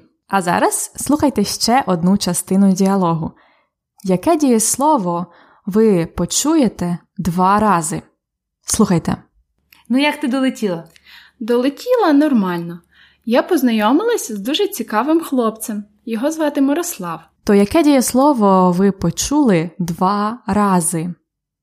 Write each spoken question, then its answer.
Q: Яке дієслово ви почуєте два рази?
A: Дієслово долетіти.